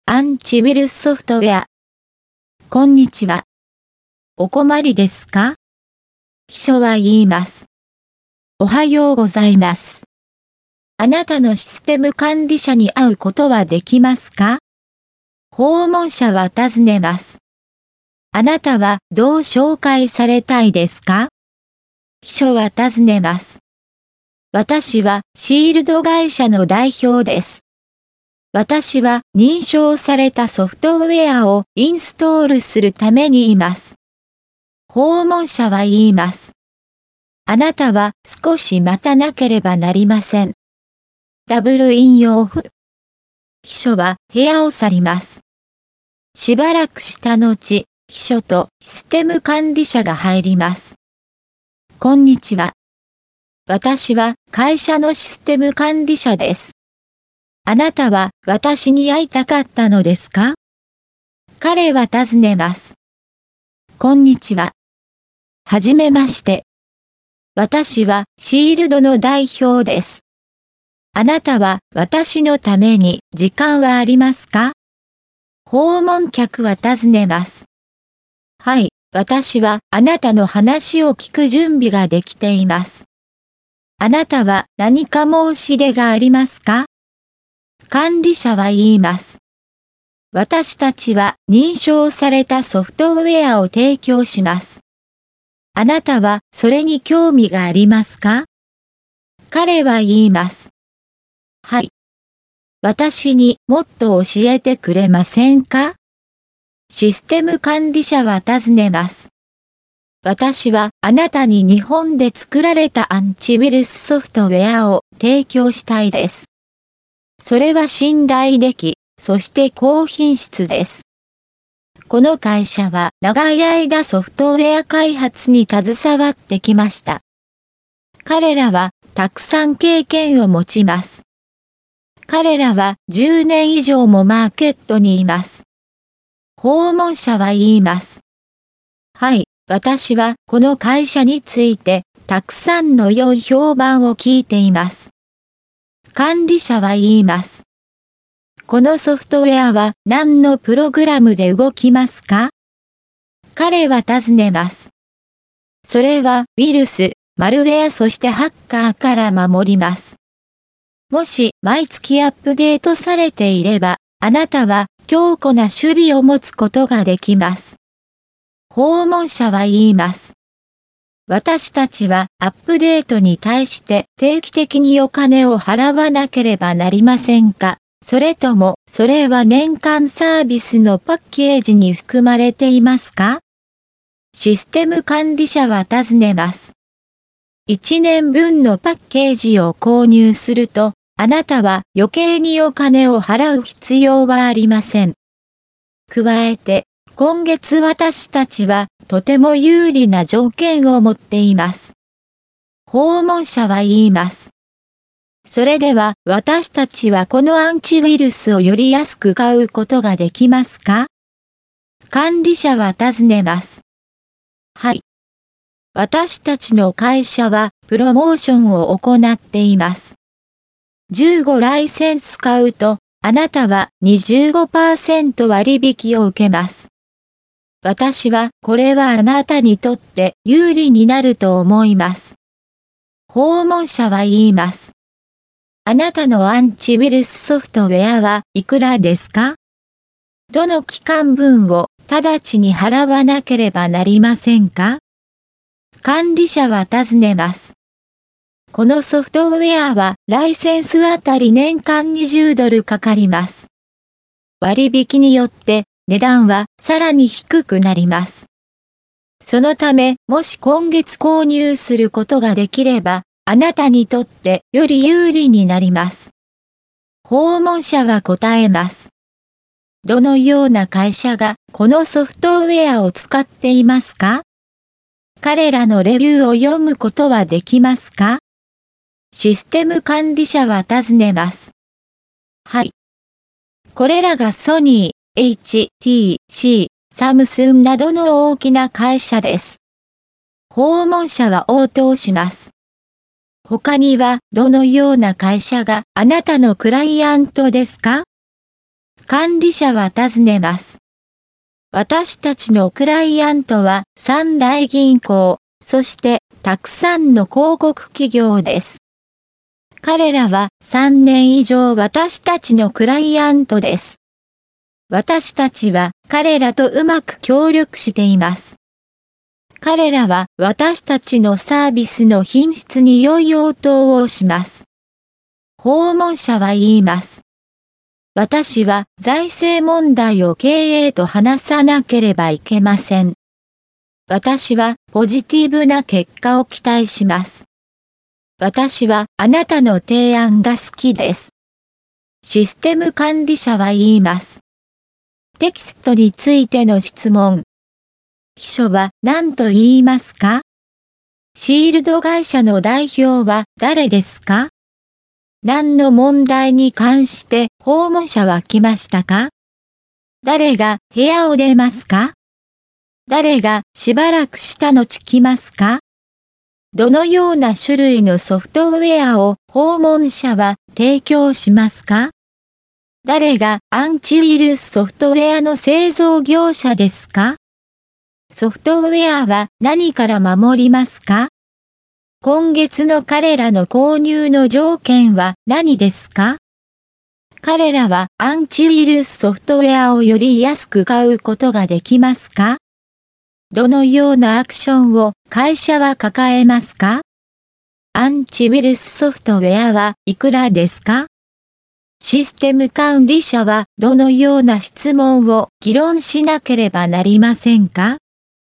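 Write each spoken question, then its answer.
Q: シールド会社の代表は誰ですか?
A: 訪問者

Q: 何の問題に関して訪問者は来ましたか?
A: 認証されたソフトウェアをインストールするため

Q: 誰が部屋を出ますか?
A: 秘書

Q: 誰がしばらくした後来ますか?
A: 秘書とシステム管理者

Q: どのような種類のソフトウェアを訪問者は提供しますか?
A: 日本で作られたアンチウイルスソフトウェア

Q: ソフトウェアは何から守りますか?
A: ウイルス、マルウェア、ハッカー

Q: 今月の彼らの購入の条件は何ですか?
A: 15ライセンス買うと25%割引

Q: 彼らはアンチウイルスソフトウェアをより安く買うことができますか?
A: はい

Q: どのようなアクションを会社は抱えますか?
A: プロモーション

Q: アンチウイルスソフトウェアはいくらですか?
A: ライセンスあたり年間20ドル

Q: システム管理者はどのような質問を議論しなければなりませんか?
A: 財政問題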